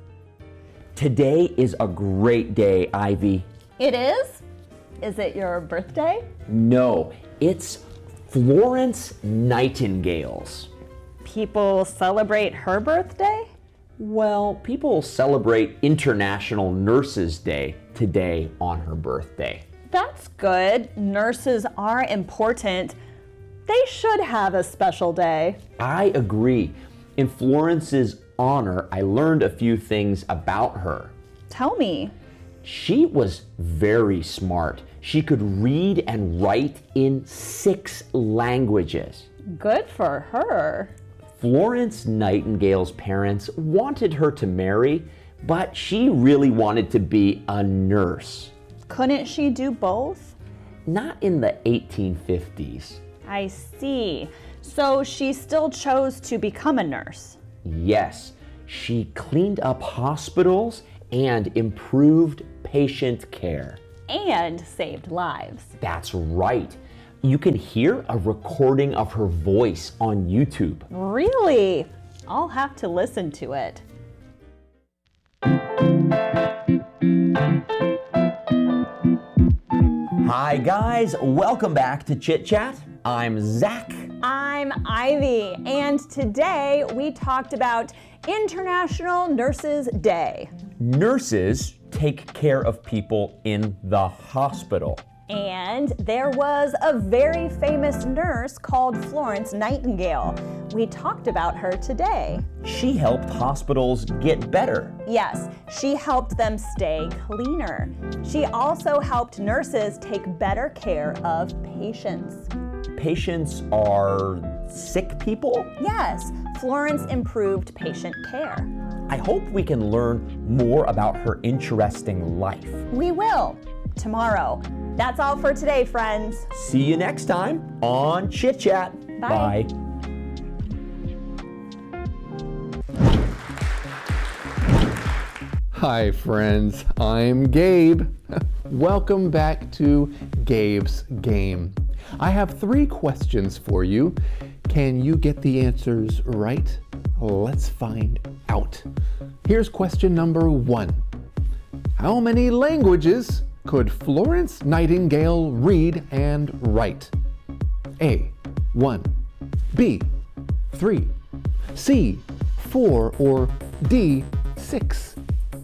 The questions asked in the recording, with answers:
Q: How many languages could Florence Nightingale read and write?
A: If you chose D, 6, you're correct.